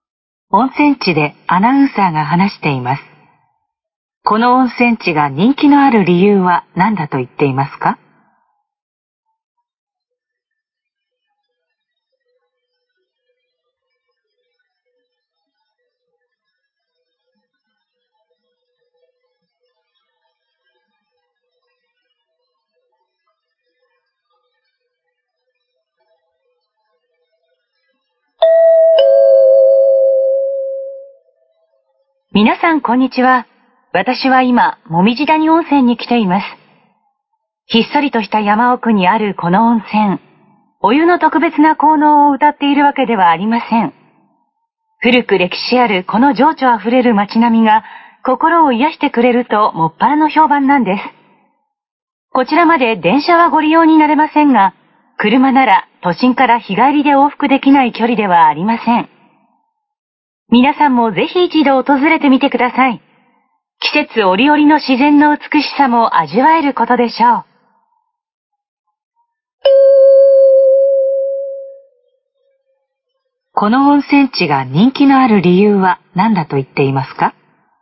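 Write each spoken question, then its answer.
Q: この温泉地が人気のある理由は何だと言っていますか?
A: 古く歴史ある情緒あふれる街並みが心を癒してくれるから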